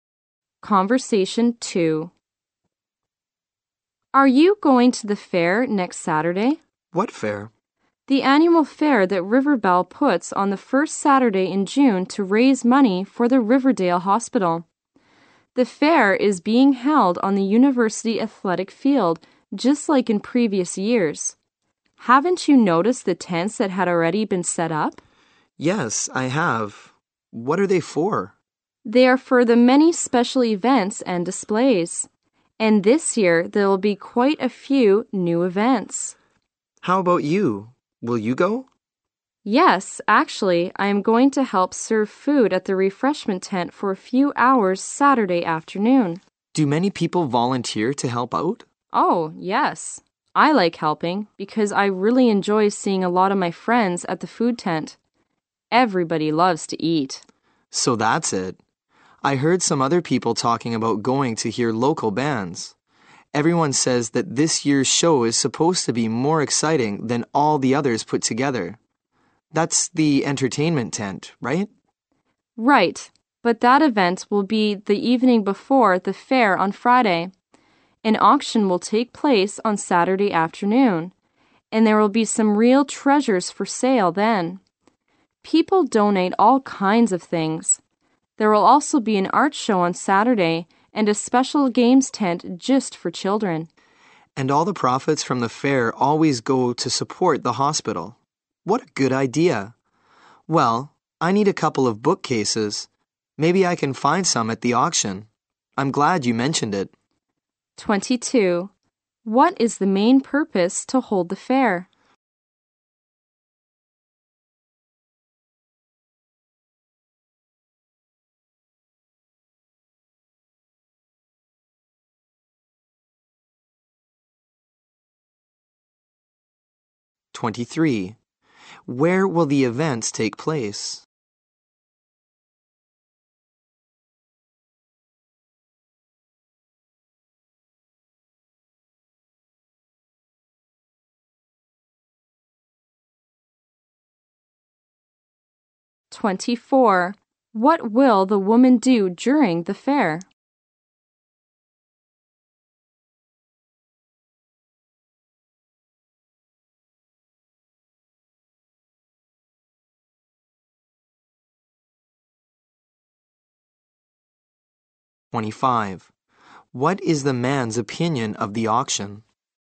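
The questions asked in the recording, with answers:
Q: What is the main purpose to hold the fair?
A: To raise money for the Riverdale Hospital

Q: Where will the events take place?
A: On the university athletic field

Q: What will the woman do during the fair?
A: Help serve food at the refreshment tent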